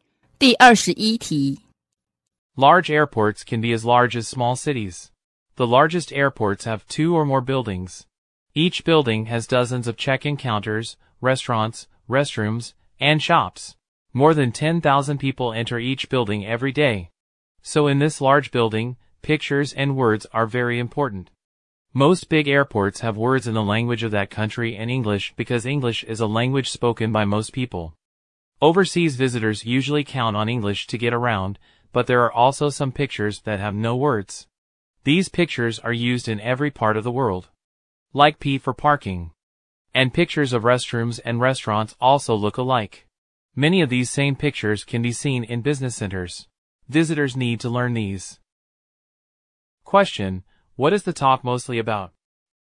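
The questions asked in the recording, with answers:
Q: what is the talk mostly about?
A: The signs (pictures and words) used in large airports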